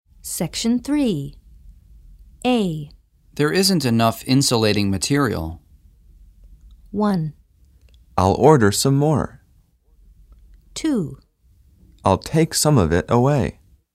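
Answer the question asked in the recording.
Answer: 1: I'll order some more.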